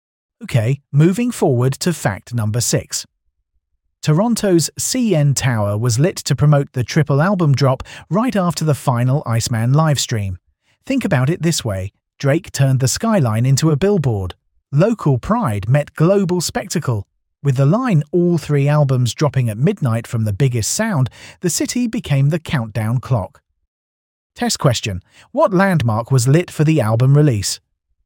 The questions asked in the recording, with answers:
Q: what landmark was lit for the album release?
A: CN Tower